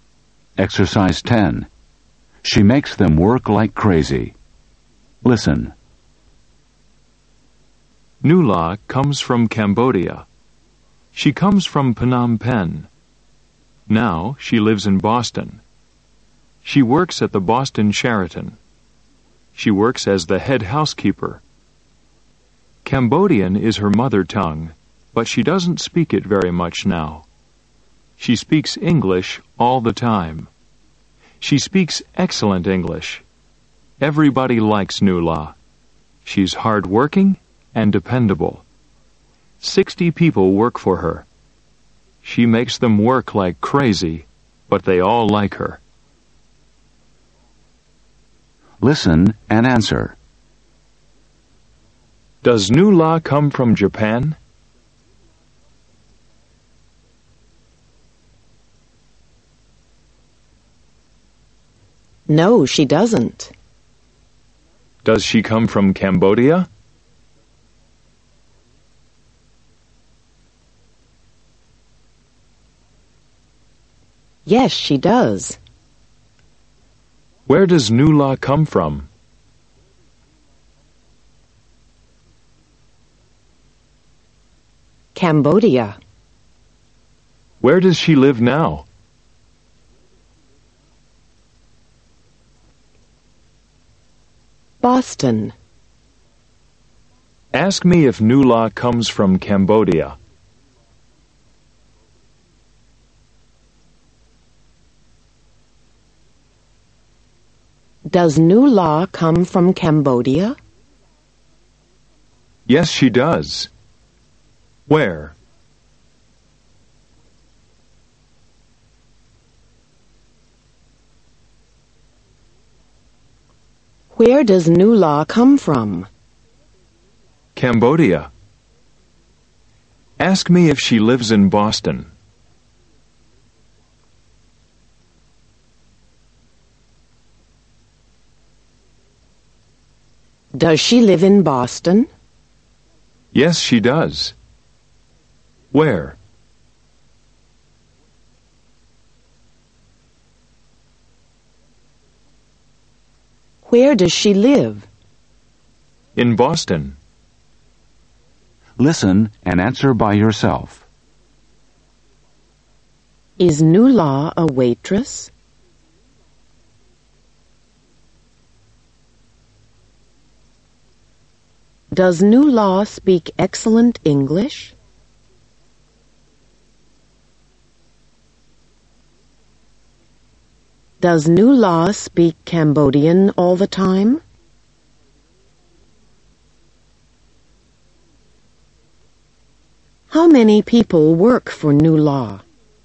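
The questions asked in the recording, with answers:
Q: Is Nula a waitress?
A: No, she isn't. She's the head housekeeper.

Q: Does Nula speak excellent English?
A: Yes, she does.

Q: Does Nula speak Cambodian all the time?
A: No, she doesn't. She speaks English all the time.

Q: How many people work for Nula?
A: 60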